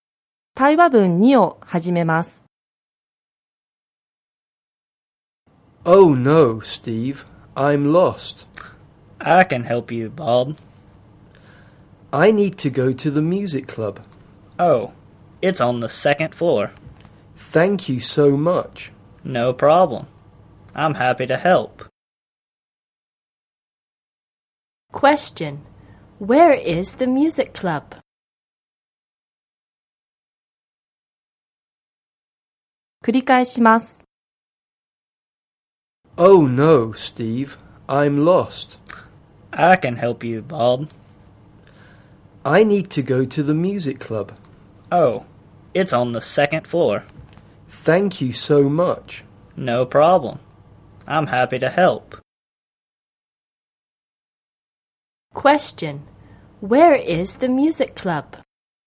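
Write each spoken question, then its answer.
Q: Where is the music club?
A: On the second floor.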